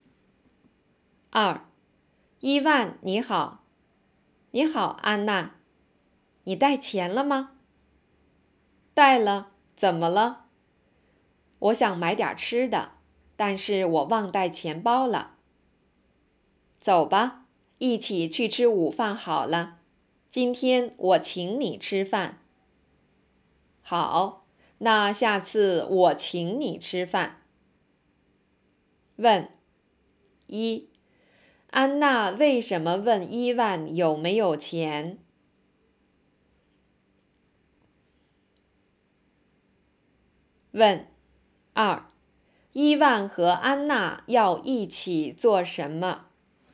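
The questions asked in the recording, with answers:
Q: 安娜为什么问伊万有没有钱?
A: 她想买点吃的,但是忘带钱包了

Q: 伊万和安娜要一起做什么?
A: 一起去吃午饭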